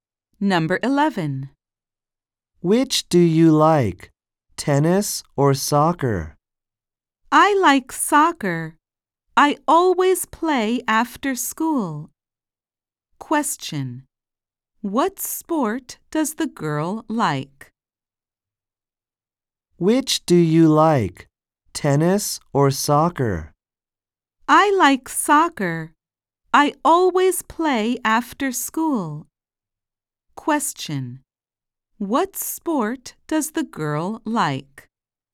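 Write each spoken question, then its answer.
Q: What sport does the girl like?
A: Soccer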